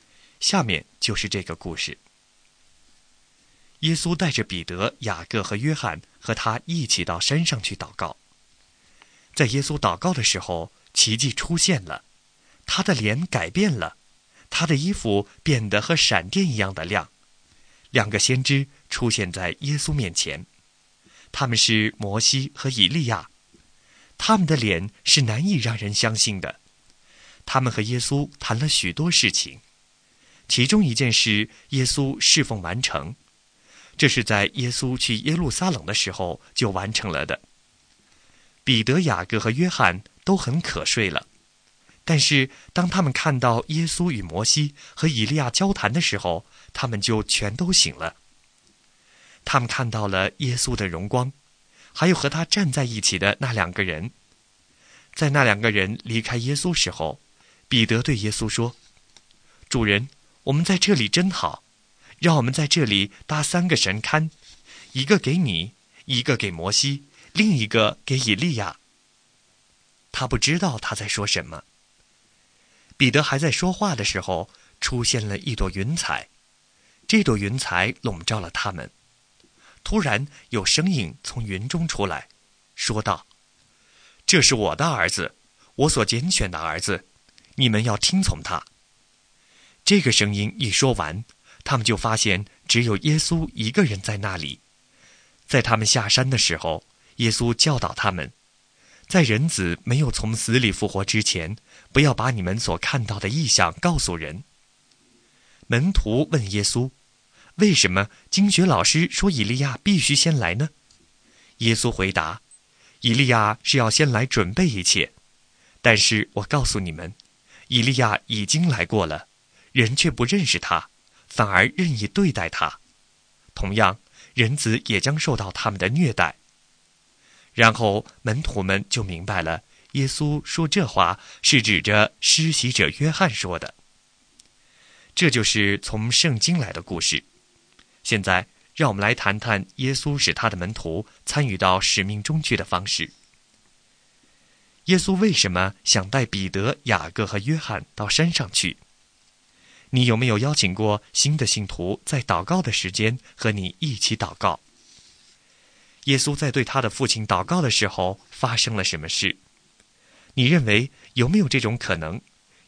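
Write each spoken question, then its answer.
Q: 耶稣在对他的父亲祷告的时候发生了什么事?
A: 他的脸改变了,衣服变得像闪电一样亮,摩西和以利亚出现和他谈话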